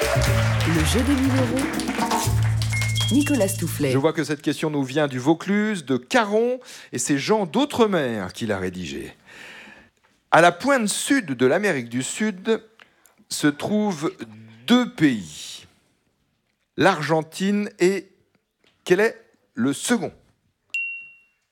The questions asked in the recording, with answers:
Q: À la pointe sud de l'Amérique du Sud... se trouvent deux pays, l'Argentine et quel est le second ?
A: Le Chili, c'est l'autre pays, bravo !